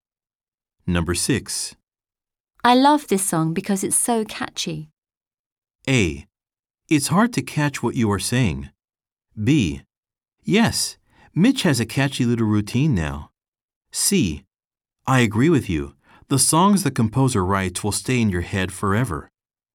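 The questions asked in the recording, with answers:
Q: I love this song because it's so catchy.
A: C: I agree with you. The songs the composer writes will stay in your head forever.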